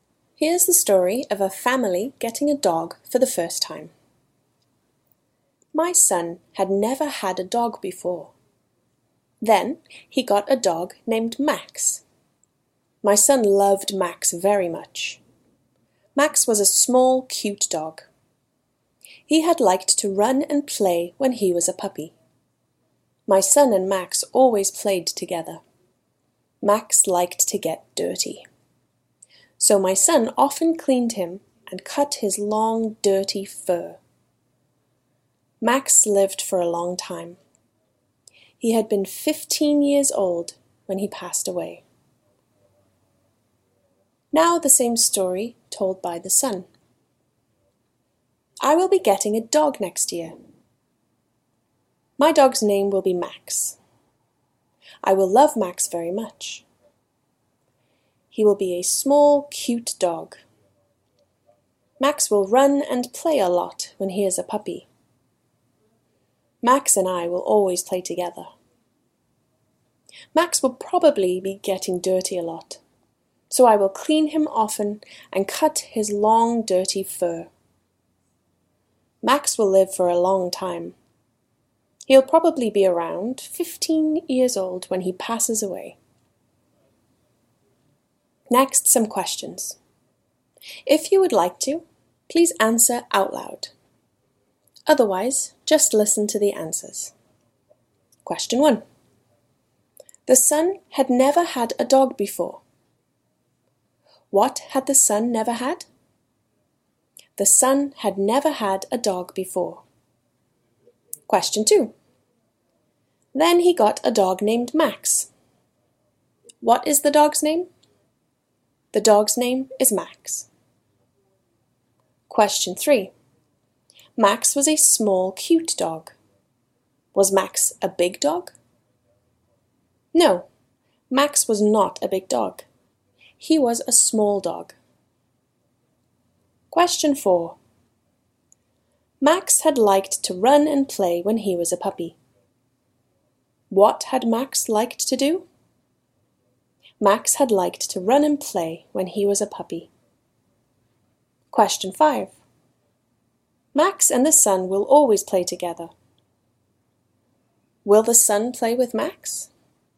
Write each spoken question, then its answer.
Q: Will the son play with Max?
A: Yes, the son and Max will always play together.